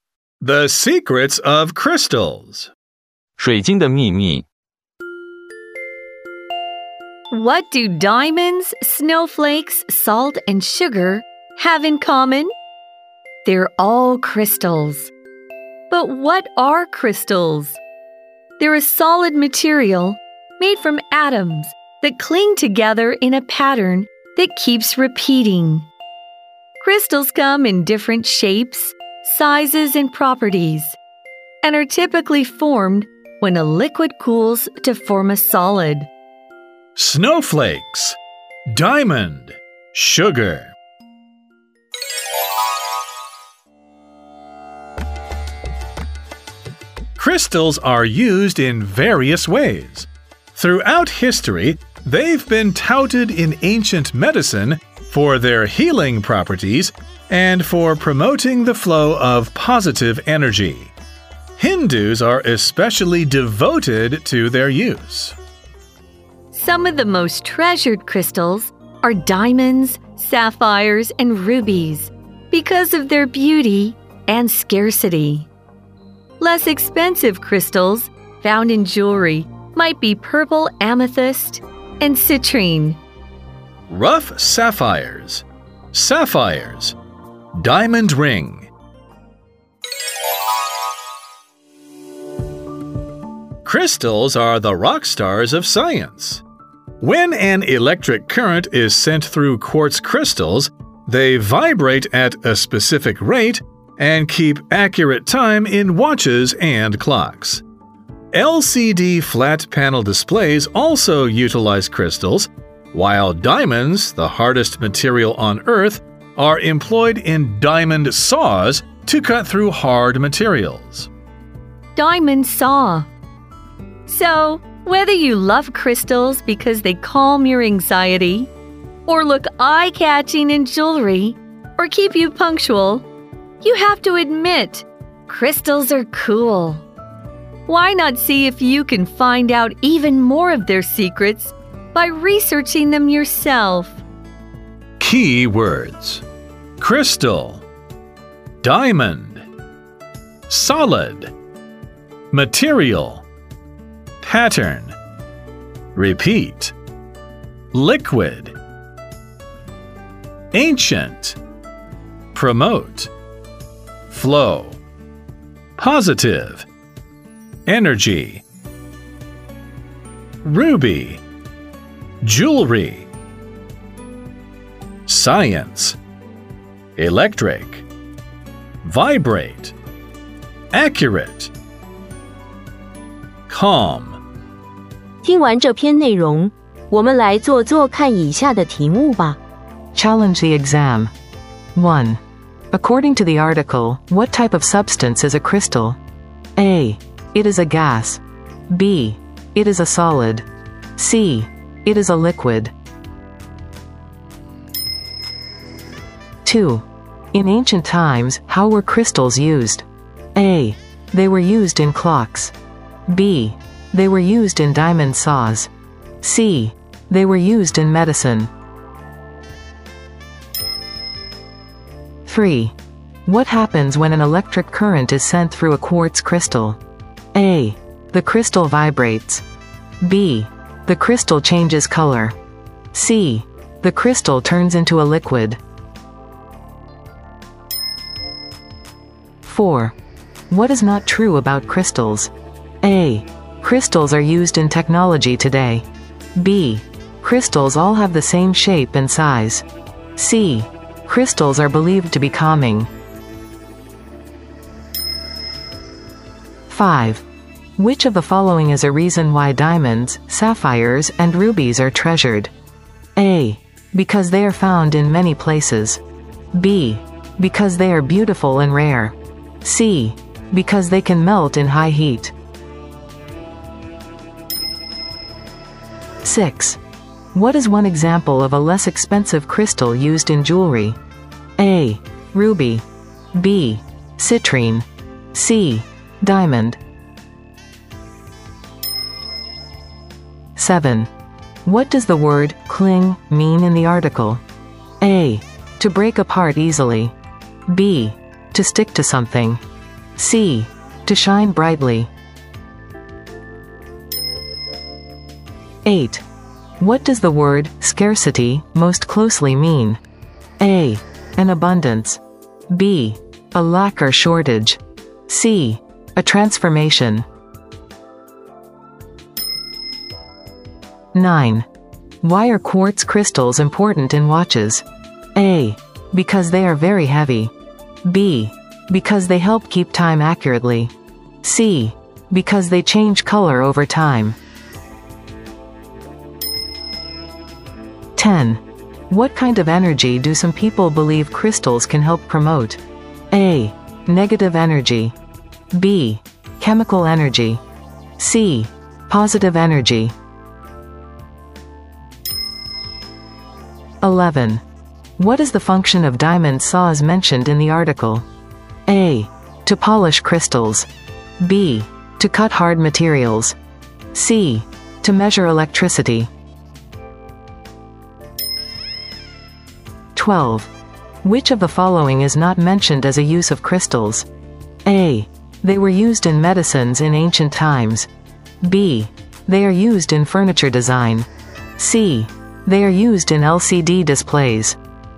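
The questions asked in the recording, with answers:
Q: According to the article, what type of substance is a crystal?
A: B: It is a solid.

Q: In ancient times, how were crystals used?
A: C: They were used in medicine.

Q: What happens when an electric current is sent through a quartz crystal?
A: A: The crystal vibrates.

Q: What is not true about crystals?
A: B: Crystals all have the same shape and size.

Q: Which of the following is a reason why diamonds, sapphires, and rubies are treasured?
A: B: Because they are beautiful and rare.

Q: What is one example of a less expensive crystal used in jewelry?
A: B: Citrine.

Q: What does the word cling mean in the article?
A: B: To stick to something.

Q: What does the word scarcity most closely mean?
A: B: A lack or shortage.

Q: Why are quartz crystals important in watches?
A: B: Because they help keep time accurately.

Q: What kind of energy do some people believe crystals can help promote?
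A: C: Positive energy.

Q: What is the function of diamond saws mentioned in the article?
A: B: To cut hard materials.

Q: Which of the following is not mentioned as a use of crystals?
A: B: They are used in furniture design.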